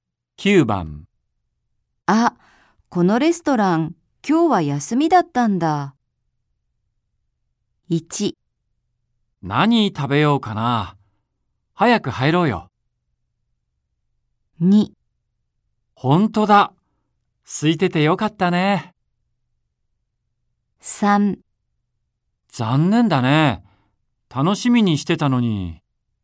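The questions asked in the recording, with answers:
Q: あ、このレストラン今日は休みだったんだ。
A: 3: 残念だね。楽しみにしてたのに。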